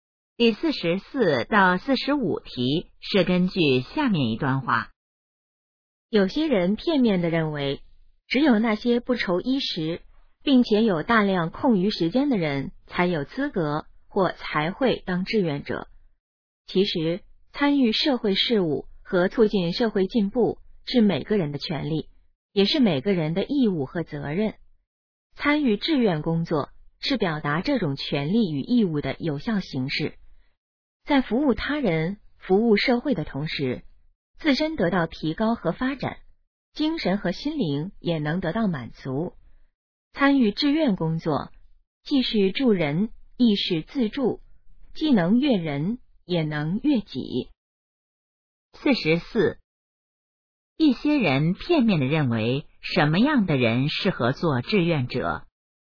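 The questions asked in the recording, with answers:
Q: 一些人片面地认为,什么样的人适合做志愿者?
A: 不愁衣食并有大量空余时间的人

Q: 说话人认为参加志愿工作有什么好处?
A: 既能助人也能自助,自身得到提高,精神得到满足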